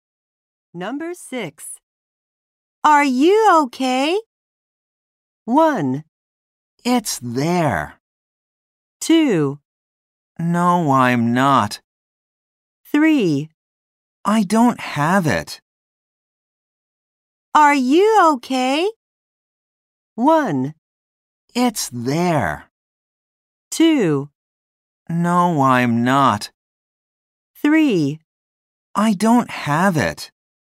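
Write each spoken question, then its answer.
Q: Are you okay?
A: 2: No, I'm not.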